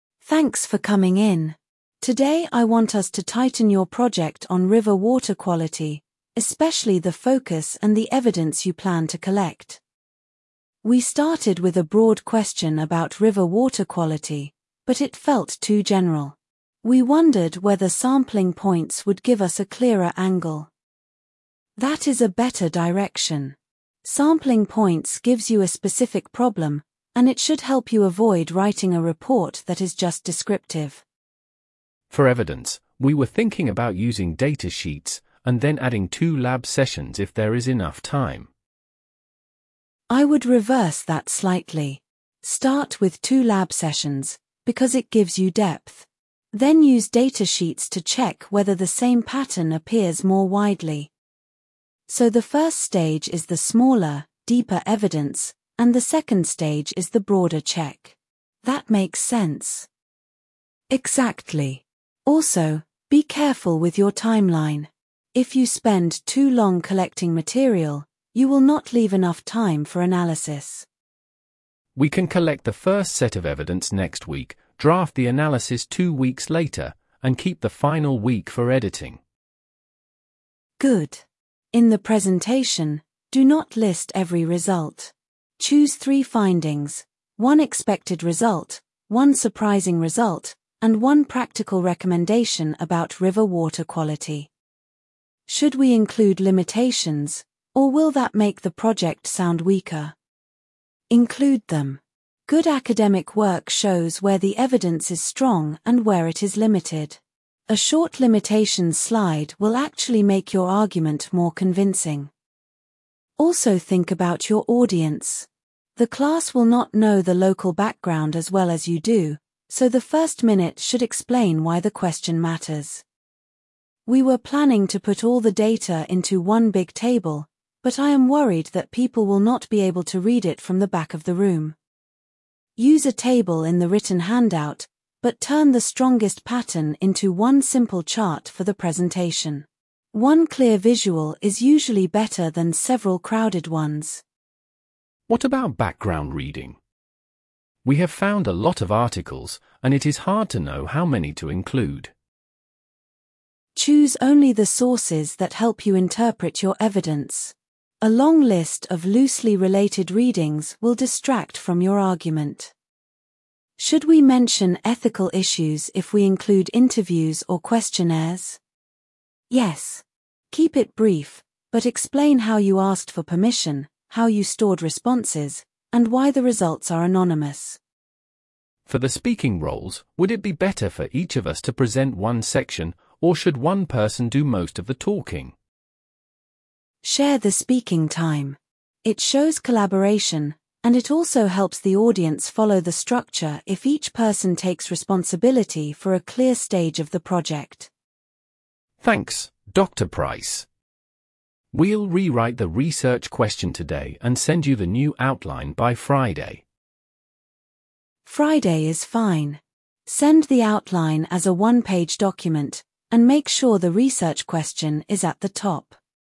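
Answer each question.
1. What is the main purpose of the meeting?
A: To refine a project on river water quality

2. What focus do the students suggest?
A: Sampling points

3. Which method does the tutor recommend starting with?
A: Two lab sessions

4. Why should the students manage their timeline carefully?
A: To leave enough time for analysis

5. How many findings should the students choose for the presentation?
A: Three

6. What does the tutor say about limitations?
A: Mention them briefly

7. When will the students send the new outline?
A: By Friday

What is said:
Tutor: Thanks for coming in. Today I want us to tighten your project on river water quality, especially the focus and the evidence you plan to collect.
Student A: We started with a broad question about river water quality, but it felt too general. We wondered whether sampling points would give us a clearer angle.
Tutor: That is a better direction. 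Sampling points gives you a specific problem, and it should help you avoid writing a report that is just descriptive.
Student B: For evidence, we were thinking about using data sheets, and then adding two lab sessions if there is enough time.
Tutor: I would reverse that slightly. Start with two lab sessions, because it gives you depth. Then use data sheets to check whether the same pattern appears more widely.
Student A: So the first stage is the smaller, deeper evidence, and the second stage is the broader check. That makes sense.
Tutor: Exactly. Also, be careful with your timeline. If you spend too long collecting material, you will not leave enough time for analysis.
Student B: We can collect the first set of evidence next week, draft the analysis two weeks later, and keep the final week for editing.
Tutor: Good. In the presentation, do not list every result. Choose three findings: one expected result, one surprising result, and one practical recommendation about river water quality.
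Student A: Should we include limitations, or will that make the project sound weaker?
Tutor: Include them. Good academic work shows where the evidence is strong and where it is limited. A short limitations slide will actually make your argument more convincing.
Tutor: Also think about your audience. The class will not know the local background as well as you do, so the first minute should explain why the question matters.
Student A: We were planning to put all the data into one big table, but I am worried that people will not be able to read it from the back of the room.
Tutor: Use a table in the written handout, but turn the strongest pattern into one simple chart for the presentation. One clear visual is usually better than several crowded ones.
Student B: What about background reading? We have found a lot of articles, and it is hard to know how many to include.
Tutor: Choose only the sources that help you interpret your evidence. 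A long list of loosely related readings will distract from your argument.
Student A: Should we mention ethical issues if we include interviews or questionnaires?
Tutor: Yes. Keep it brief, but explain how you asked for permission, how you stored responses, and why the results are anonymous.
Student B: For the speaking roles, would it be better for each of us to present one section, or should one person do most of the talking?
Tutor: Share the speaking time. It shows collaboration, and it also helps the audience follow the structure if each person takes responsibility for a clear stage of the project.
Student B: Thanks, Dr Price. We'll rewrite the research question today and send you the new outline by Friday.
Tutor: Friday is fine. Send the outline as a one-page document, and make sure the research question is at the top.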